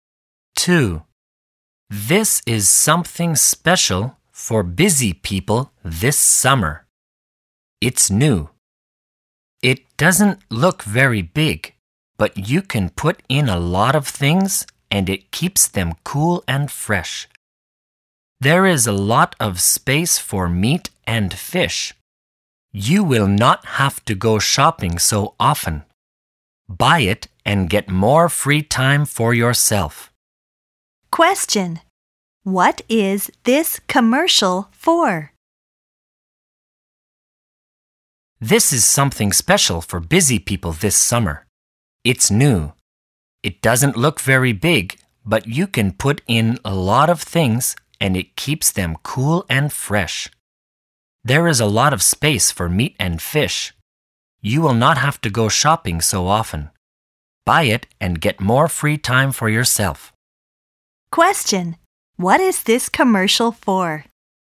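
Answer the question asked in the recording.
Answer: A refrigerator.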